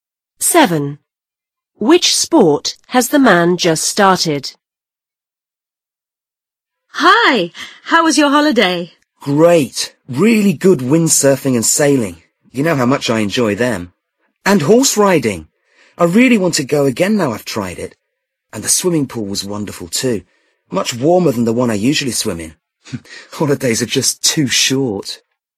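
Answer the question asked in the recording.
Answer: Horse riding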